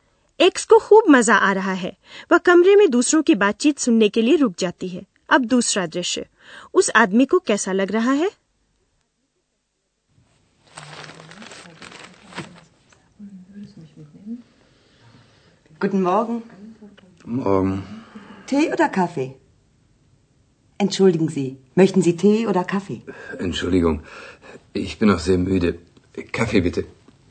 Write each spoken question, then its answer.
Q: उस आदमी को कैसा लग रहा है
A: एक आदमी कुछ उनीदा सा नाश्ते के लिए आया है